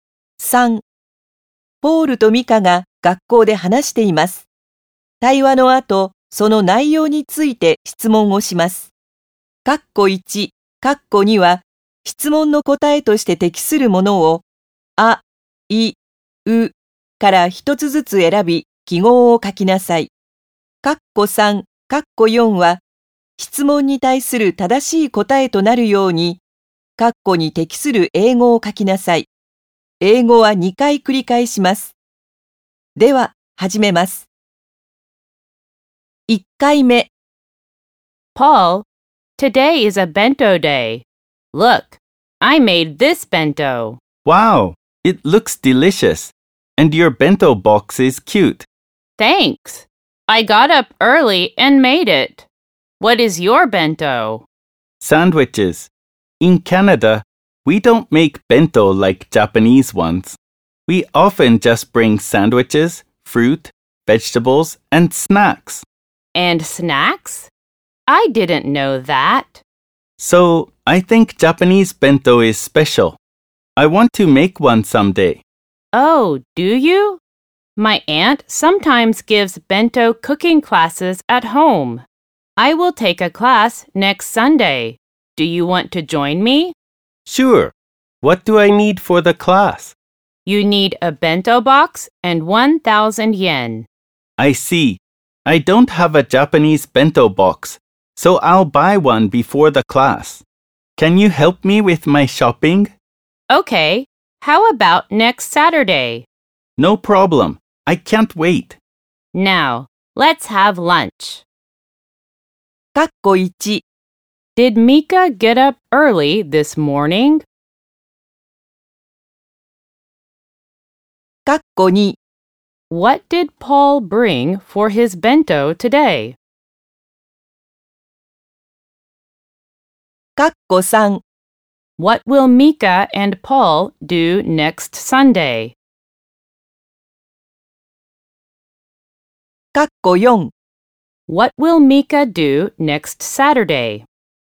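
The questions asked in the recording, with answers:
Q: Did Mika get up early this morning?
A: Yes, she did.

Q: What did Paul bring for his bento today?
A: Sandwiches

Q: What will Mika and Paul do next Sunday?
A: They will take a bento cooking class at Mika's aunt's home

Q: What will Mika do next Saturday?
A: She will help Paul shop for a bento box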